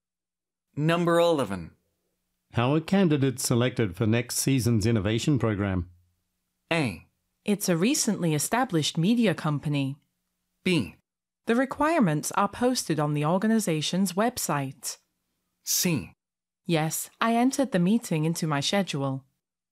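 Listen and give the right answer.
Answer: B: The requirements are posted on the organization's website.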